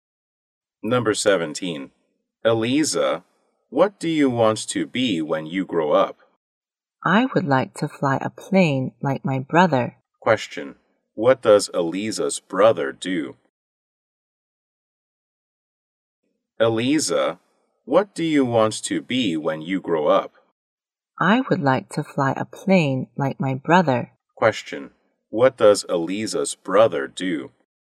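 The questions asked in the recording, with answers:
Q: What does Eliza's brother do?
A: A pilot.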